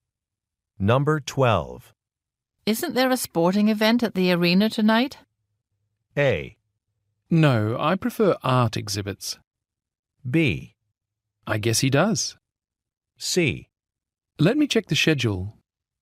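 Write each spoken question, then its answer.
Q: Isn't there a sporting event at the arena tonight?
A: C: Let me check the schedule.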